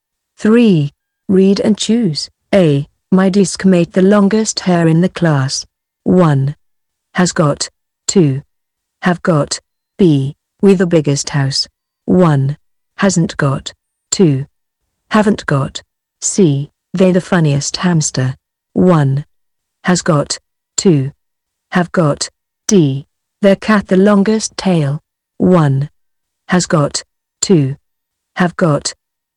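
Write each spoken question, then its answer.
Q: My deskmate the longest hair in the class.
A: 1: Has got

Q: They the funniest hamster.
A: 2: Have got

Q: Their cat the longest tail.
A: 1: Has got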